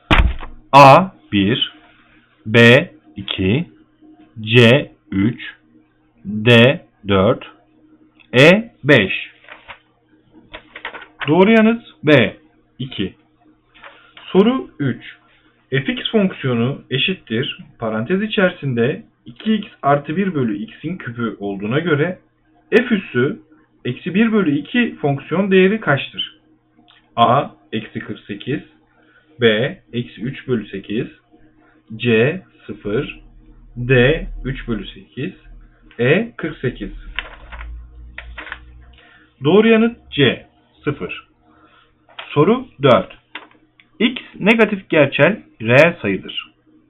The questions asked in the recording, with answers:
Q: fx fonksiyonu eşittir parantez içerisinde 2x artı 1 bölü x'in kübü olduğuna göre f üssü eksi 1 bölü 2 fonksiyon değeri kaçtır?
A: Doğru yanıt C 0